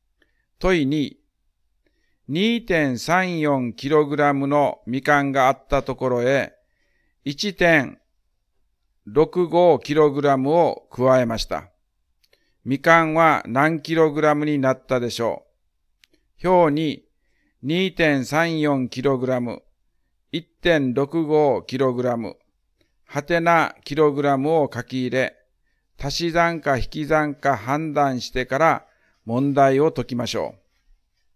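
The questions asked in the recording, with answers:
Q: 2.34kg のみかんがあったところへ 1.65kg を加えました。みかんは何 kg になったでしょう。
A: 3.99kg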